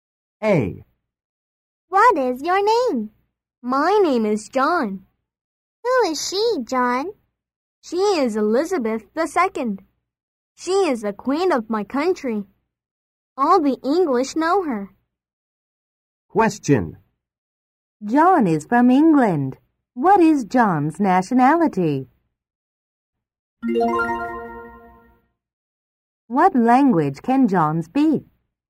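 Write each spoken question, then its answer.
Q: John is from England. What is John's nationality?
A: English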